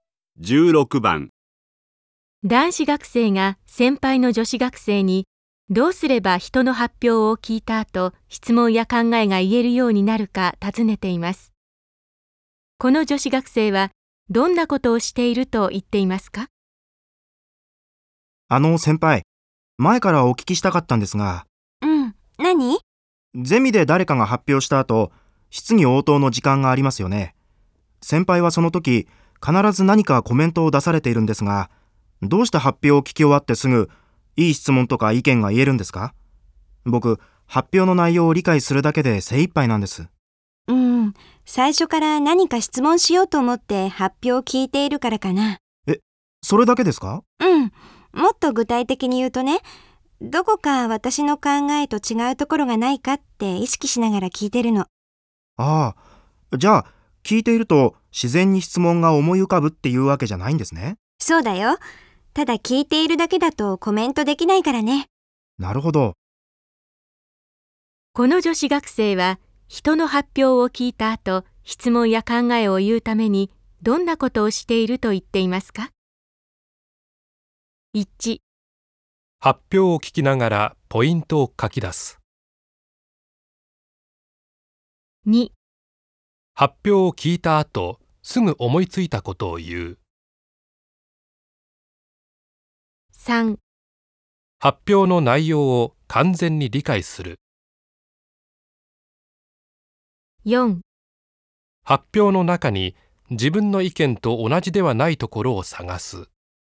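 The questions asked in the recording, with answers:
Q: この女子学生は人の発表を聞いた後、質問や考えを言うためにどんなことをしていると言っていますか?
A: 4: 発表の中に自分の意見と同じではないところを探す。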